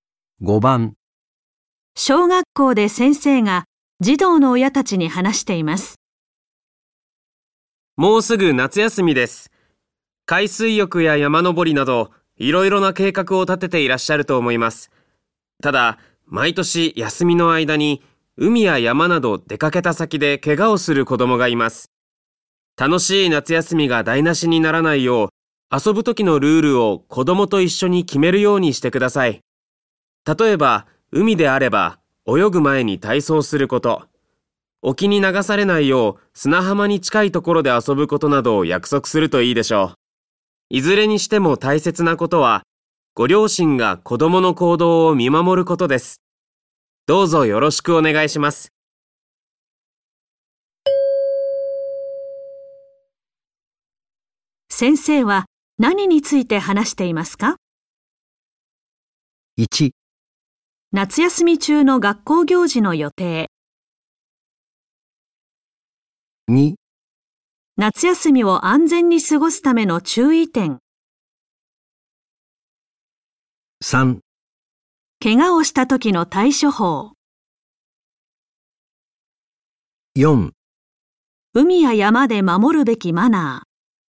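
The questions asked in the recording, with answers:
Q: 先生は何について話していますか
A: 2: 夏休みを安全に過ごすための注意点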